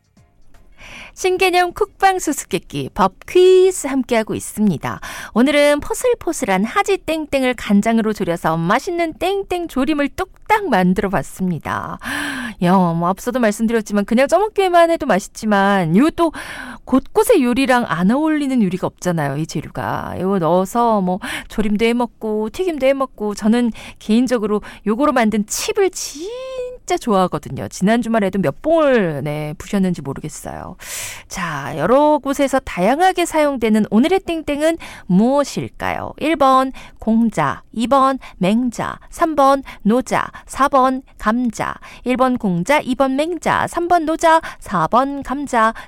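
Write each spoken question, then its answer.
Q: 자, 여러 곳에서 다양하게 사용되는 오늘의 땡땡은 무엇일까요?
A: 4번: 감자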